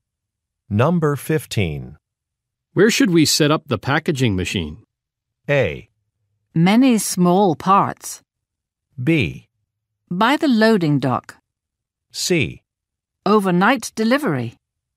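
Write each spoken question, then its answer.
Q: Where should we set up the packaging machine?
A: B: By the loading dock.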